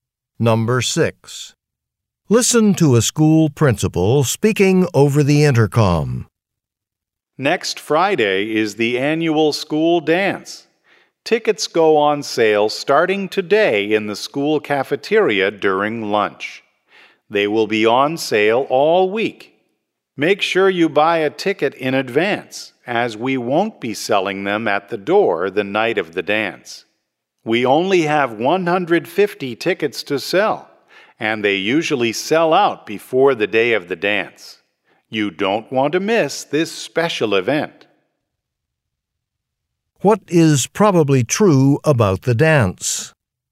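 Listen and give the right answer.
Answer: Tickets will sell out before the dance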